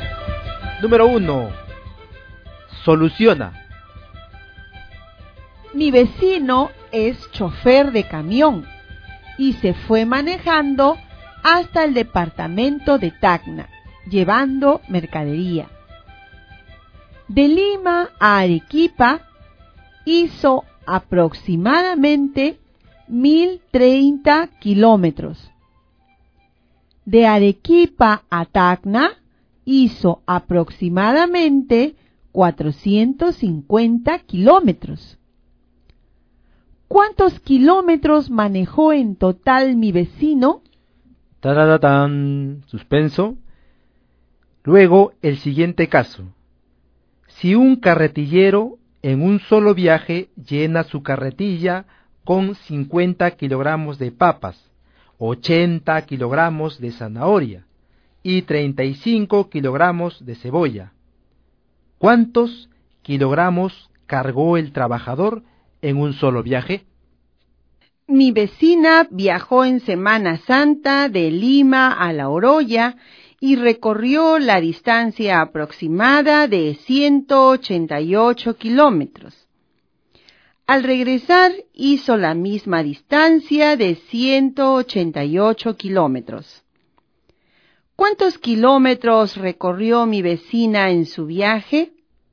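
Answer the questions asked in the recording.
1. 1.480 kilómetros
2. 165 kilogramos
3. 376 kilómetros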